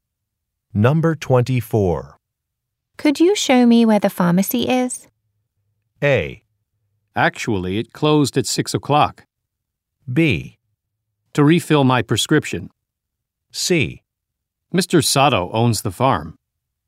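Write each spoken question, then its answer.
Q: Could you show me where the pharmacy is?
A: A: Actually, it closed at 6 o'clock.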